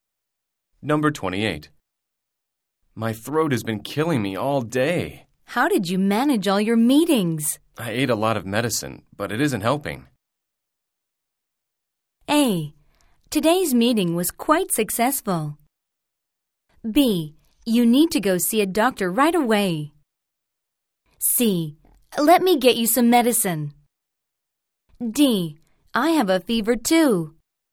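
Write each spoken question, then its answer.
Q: My throat has been killing me all day. How did you manage all your meetings? I ate a lot of medicine, but it isn't helping.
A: B: You need to go see a doctor right away.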